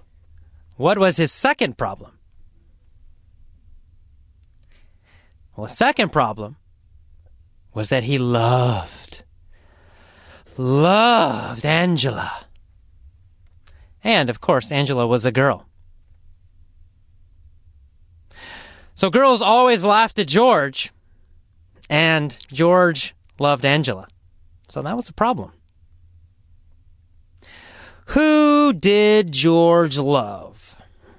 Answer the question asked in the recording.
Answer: Angela. He loved Angela.